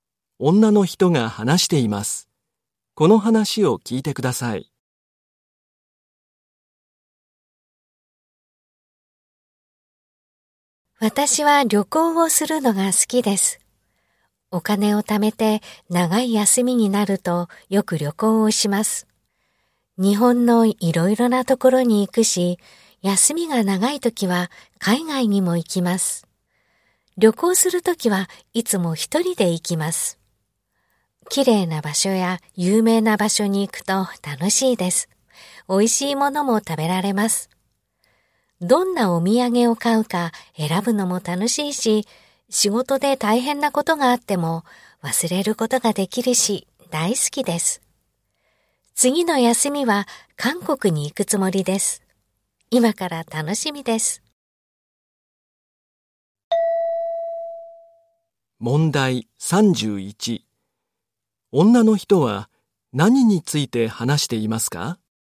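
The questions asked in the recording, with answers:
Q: 女の人は何について話していますか?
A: 旅行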